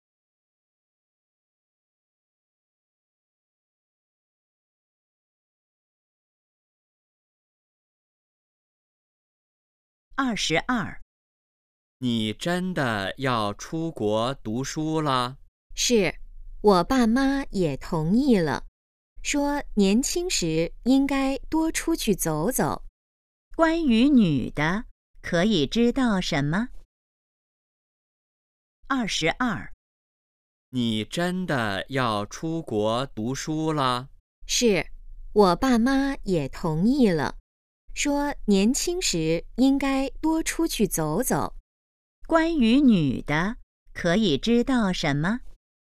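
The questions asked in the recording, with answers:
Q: 关于女的,可以知道什么?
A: 她要出国读书了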